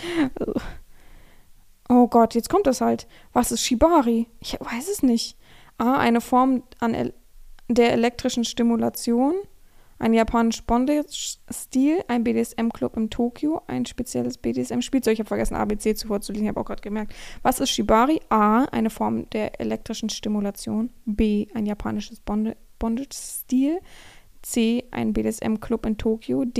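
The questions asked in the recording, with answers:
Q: Was ist Shibari?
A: B: Ein japanischer Bondage-Stil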